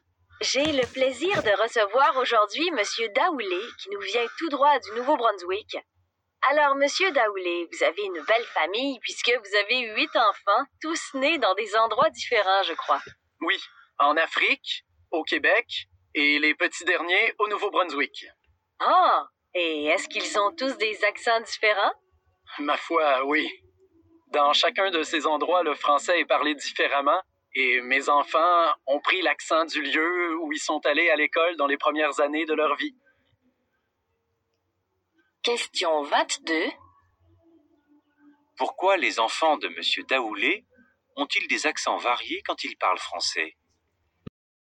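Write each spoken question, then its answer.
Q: Pourquoi les enfants de M. Daoulé ont-ils des accents variés quand ils parlent français?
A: Parce qu'ils ont pris l'accent du lieu où ils sont allés à l'école dans leurs premières années (Afrique, Québec, Nouveau-Brunswick).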